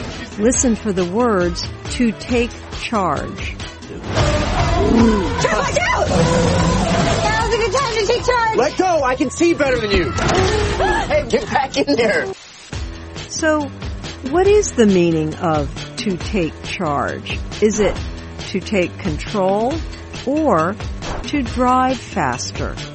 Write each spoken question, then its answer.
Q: So, what is the meaning of to take charge? Is it to take control or to drive faster?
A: To take charge means to take control.